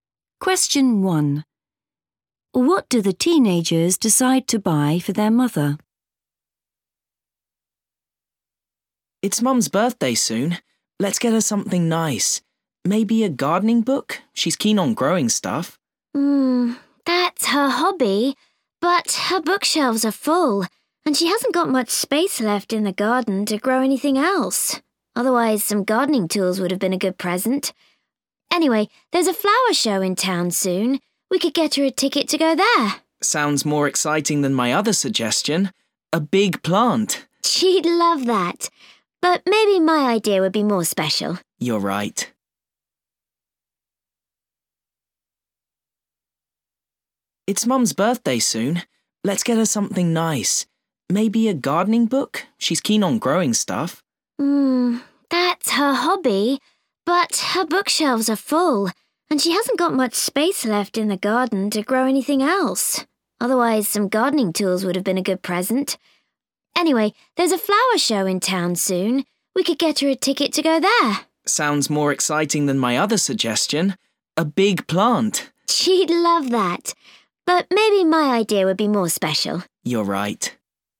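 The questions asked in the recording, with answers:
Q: What do the teenagers decide to buy for their mother?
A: a ticket to the flower show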